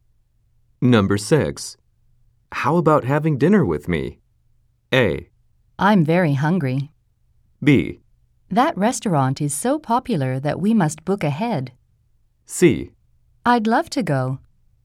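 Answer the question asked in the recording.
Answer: C: I'd love to go.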